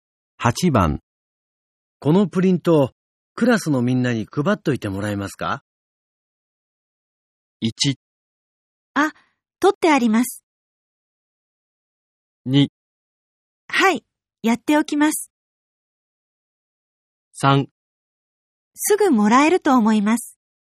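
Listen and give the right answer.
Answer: 2: はい、やっておきます。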